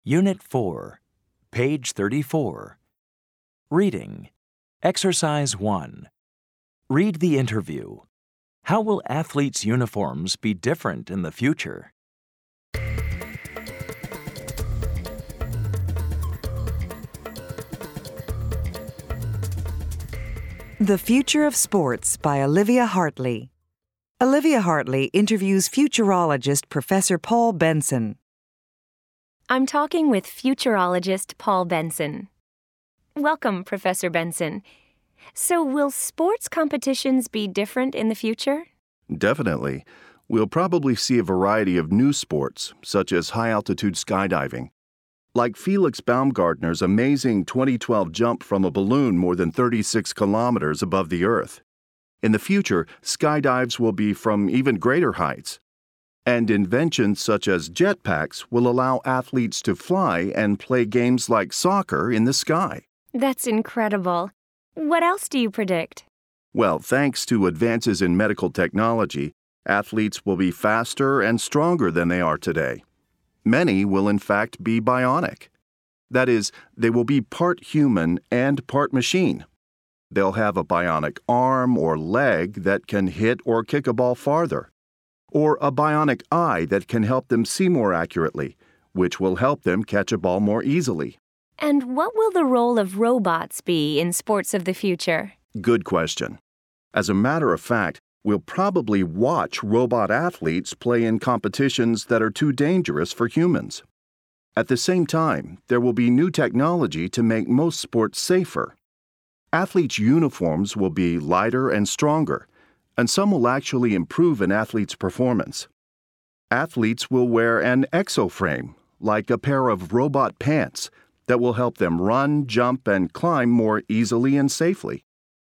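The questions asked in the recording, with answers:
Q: How will athletes' uniforms be different in the future?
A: They will be lighter and stronger, and some will improve an athlete's performance.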